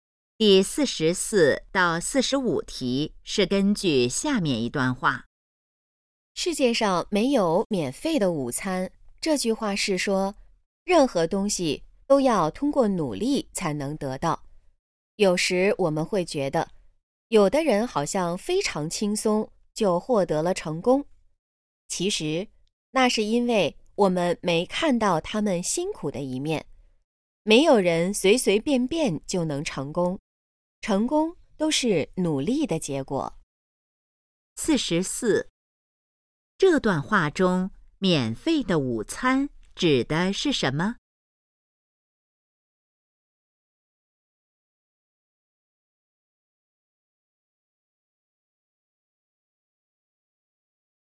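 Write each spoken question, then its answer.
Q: 这段话中,免费的午餐指的是什么?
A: 不通过努力就能得到的东西

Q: 这段话主要想告诉我们什么?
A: 成功要靠努力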